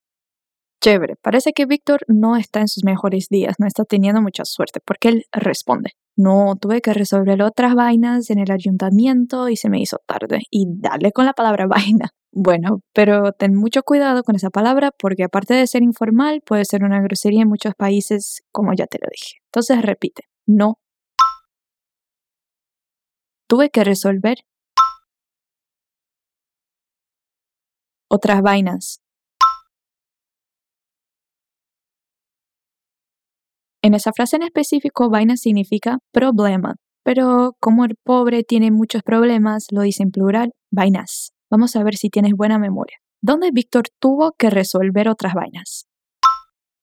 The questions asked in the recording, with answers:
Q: ¿Dónde Víctor tuvo que resolver otras vainas?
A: En el ayuntamiento.